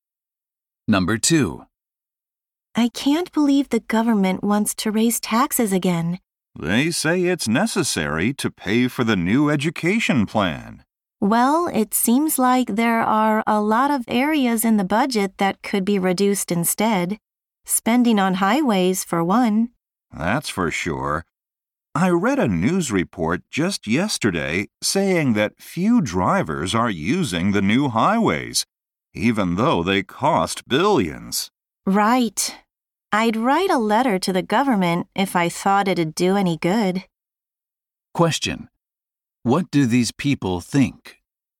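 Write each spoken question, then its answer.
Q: What do these people think?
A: The government should cut spending, such as on highways, instead of raising taxes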